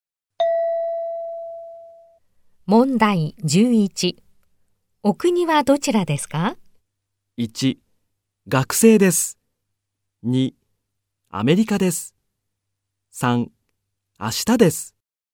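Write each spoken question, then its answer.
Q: お国はどちらですか?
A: 3: アメリカです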